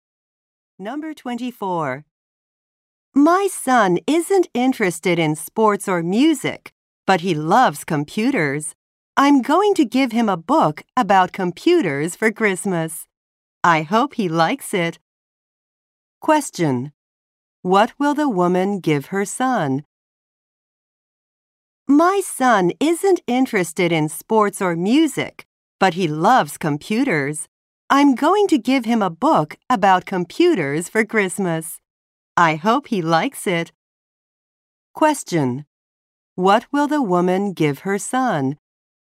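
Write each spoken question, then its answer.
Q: What will the woman give her son?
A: A book about computers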